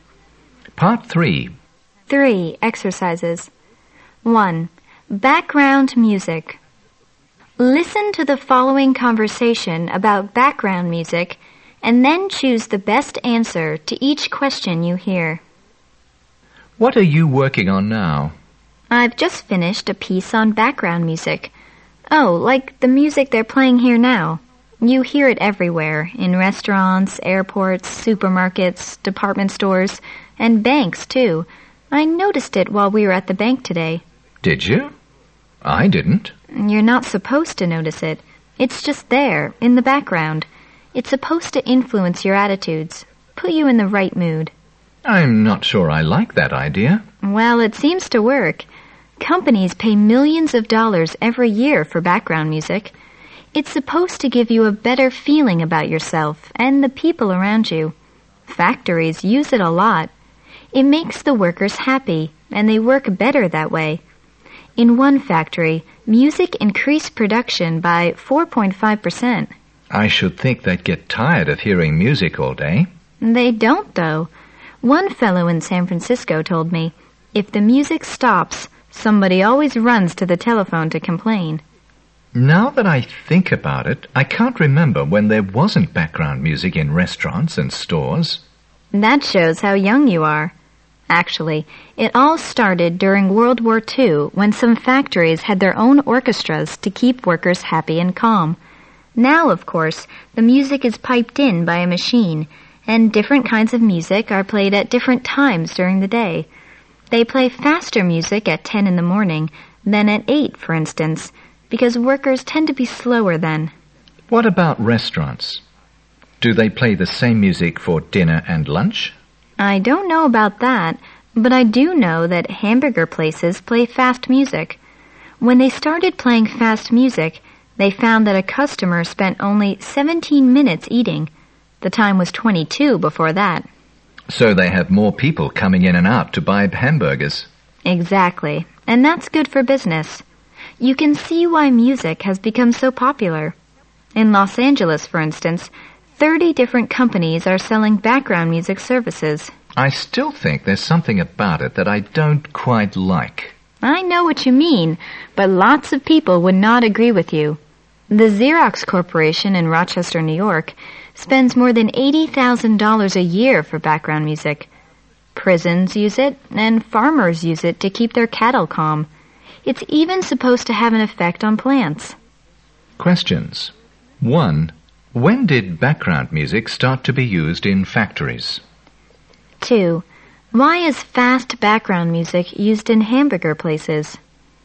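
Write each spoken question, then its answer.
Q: When did background music start to be used in factories?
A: During World War II

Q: Why is fast background music used in hamburger places?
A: Customers eat faster, so more people come in and out, which is good for business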